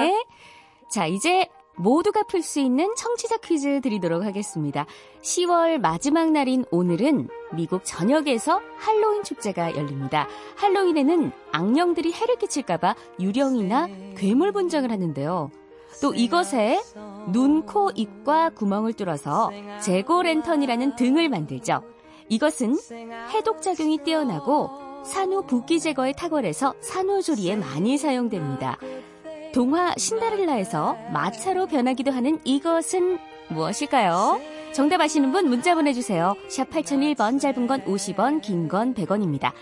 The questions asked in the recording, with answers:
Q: 동화 신데렐라에서 마차로 변하기도 하는 이것은 무엇일까요?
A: 바로 호박입니다.